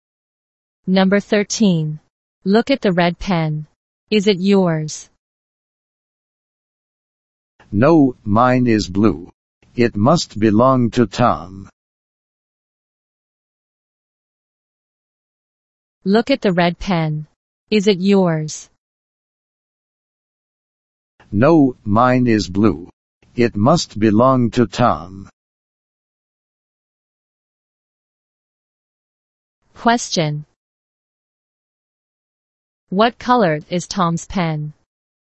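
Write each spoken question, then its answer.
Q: What color is Tom's pen?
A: Red.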